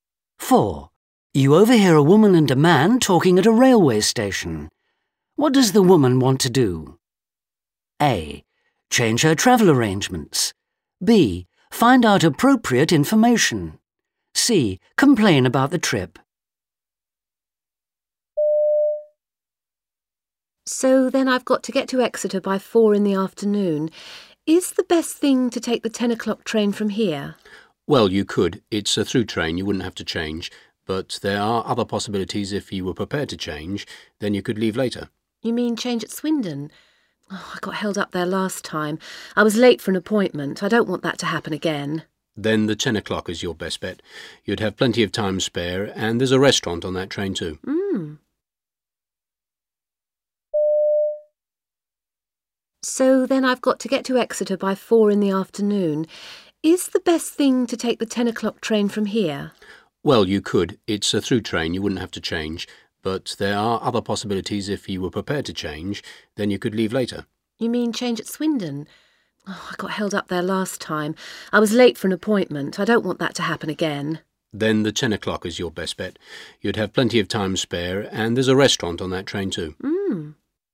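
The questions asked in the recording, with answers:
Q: What does the woman want to do?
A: B: Find out appropriate information.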